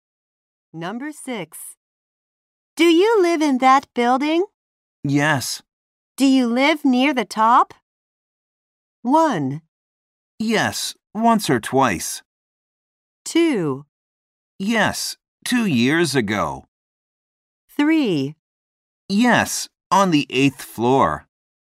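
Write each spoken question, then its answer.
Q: Do you live near the top?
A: 3: Yes, on the 8th floor.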